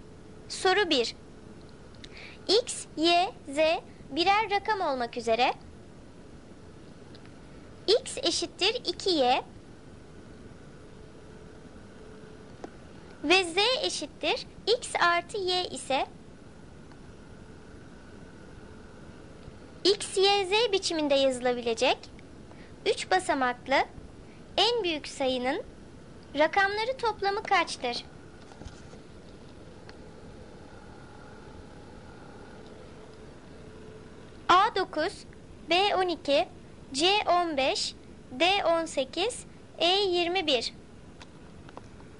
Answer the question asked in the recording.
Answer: Doğru cevap D18.